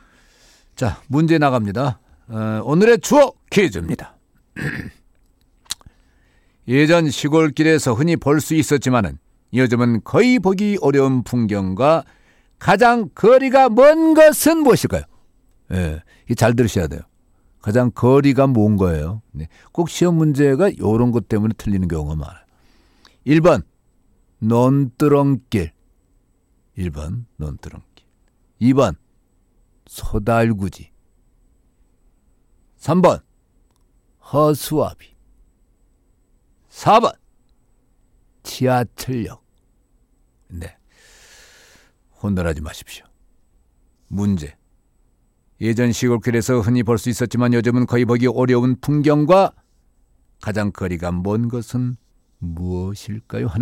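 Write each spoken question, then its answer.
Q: 예전 시골길에서 흔히 볼 수 있었지만은 요즘은 거의 보기 어려운 풍경과 가장 거리가 먼 것은 무엇일까요?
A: 4: 지하철역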